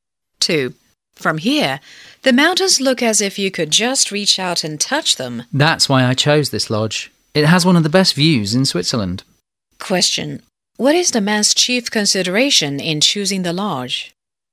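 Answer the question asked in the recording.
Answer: The view of the mountains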